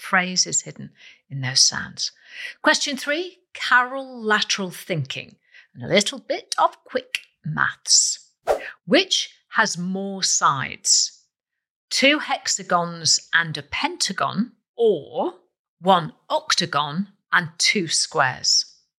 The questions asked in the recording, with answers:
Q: Which has more sides? Two hexagons and a pentagon, or one octagon and two squares?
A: So 2 hexagons and 1 pentagon is the correct answer I was looking for.